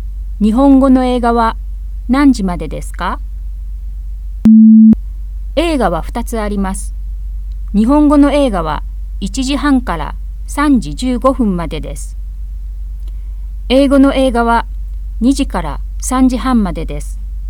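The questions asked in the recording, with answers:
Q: 日本語の映画は何時までですか?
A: 3時15分まで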